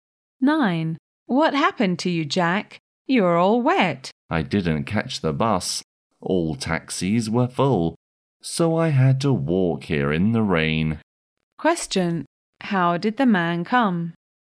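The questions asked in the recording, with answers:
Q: How did the man come?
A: On foot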